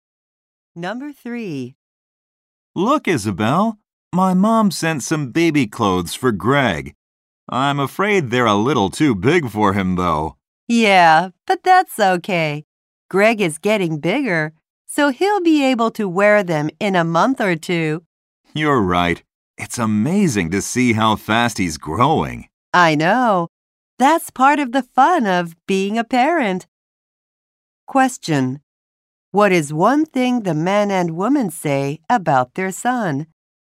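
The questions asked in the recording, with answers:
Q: What is one thing the man and woman say about their son?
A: He is growing very fast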